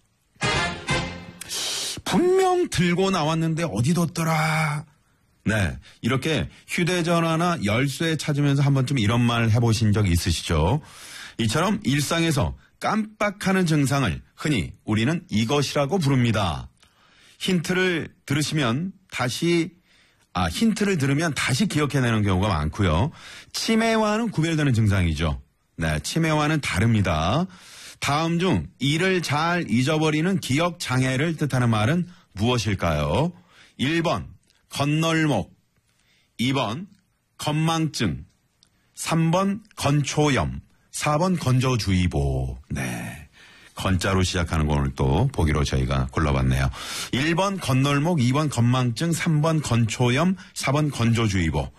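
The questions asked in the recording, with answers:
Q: 다음 중 일을 잘 잊어버리는 기억장애를 뜻하는 말은 무엇일까요?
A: 2: 건망증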